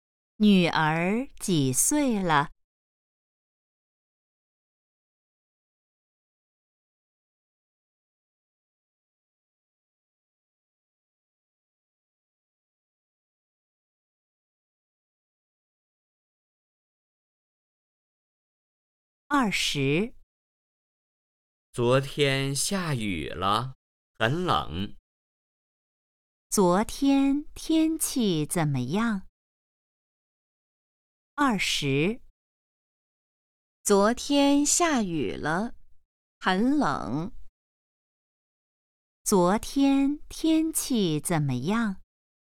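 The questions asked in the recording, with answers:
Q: 昨天天气怎么样?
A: 下雨了,很冷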